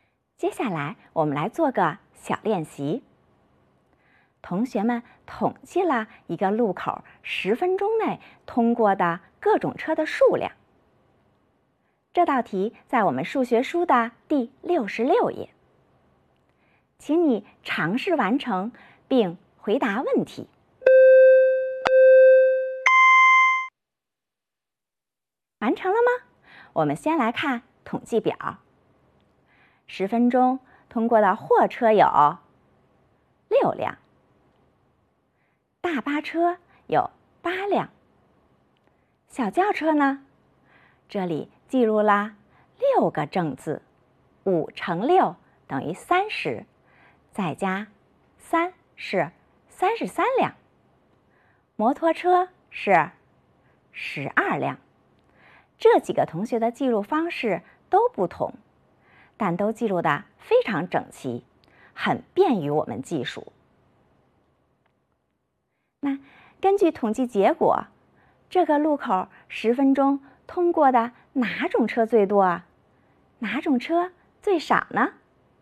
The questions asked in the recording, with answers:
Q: 那根据统计结果,这个路口十分钟通过的哪种车最多啊?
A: 十分钟内通过的小轿车最多

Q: 哪种车最少呢?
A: 货车最少